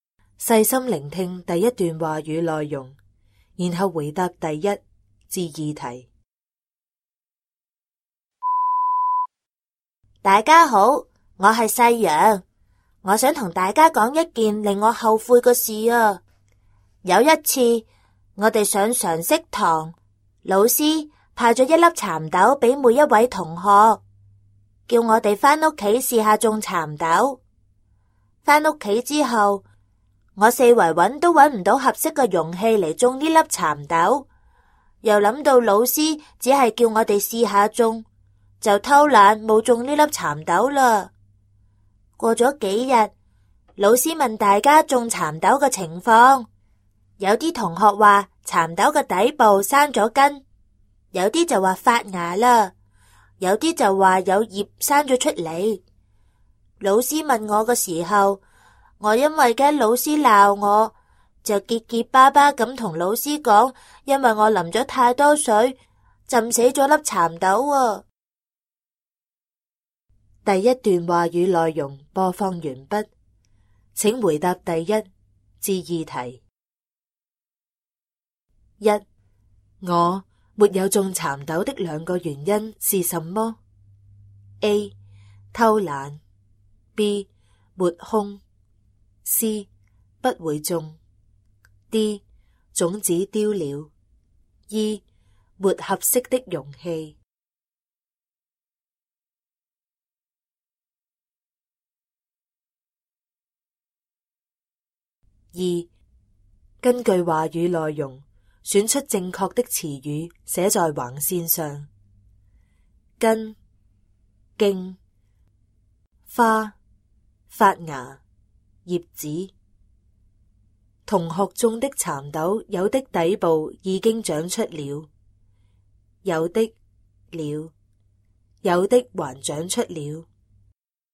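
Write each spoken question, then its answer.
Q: 我没有种蚕豆的两个原因是什么? A. 偷懒, B. 抹空, C. 不会种, D. 种子丢了, E. 没合适的容器。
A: A: 偷懒;E: 没合适的容器

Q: 根据话语内容选出正确的词语,写在横线上。根、茎、花、发芽、叶子。 同学种的蚕豆,有的底部已经长出了,有的了,有的还长出了。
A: 根;发芽;叶子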